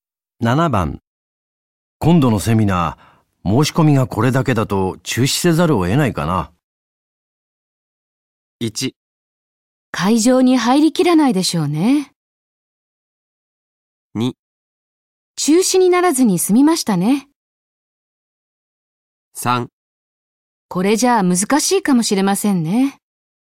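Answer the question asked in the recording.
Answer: 3: これじゃあ難しいかもしれませんね。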